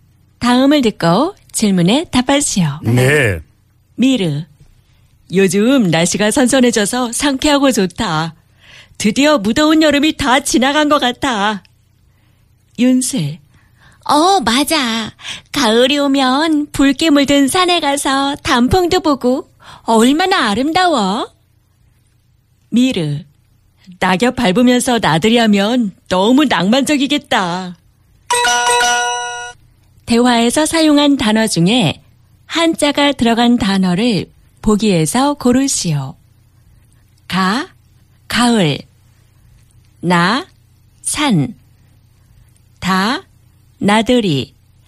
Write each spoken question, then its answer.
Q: 대화에서 사용한 단어 중에 한자가 들어간 단어를 보기에서 고르시오.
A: San. The character, Chinese character, hanja word is san.